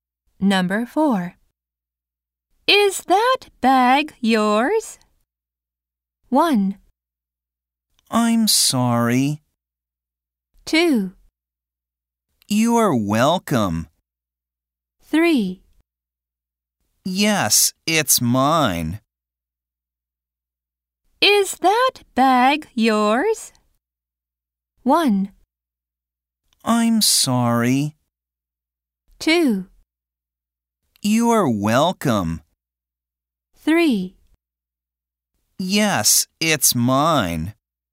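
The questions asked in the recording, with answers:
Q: Is that bag yours?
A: 3: Yes, it's mine.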